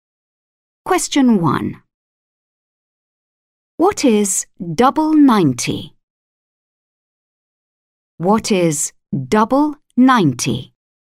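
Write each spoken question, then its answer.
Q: What is double 90?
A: 180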